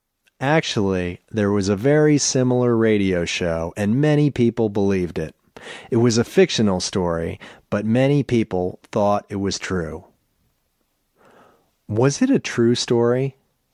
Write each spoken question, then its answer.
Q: Was it a true story?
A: No, it wasn't a true story.